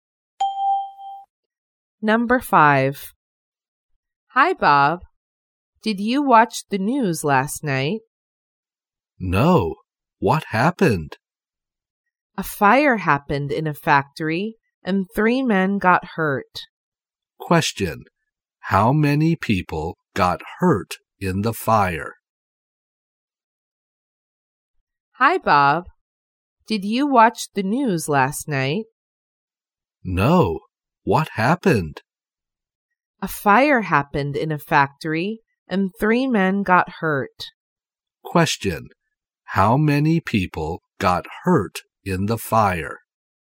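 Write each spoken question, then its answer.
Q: How many people got hurt in the fire?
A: Three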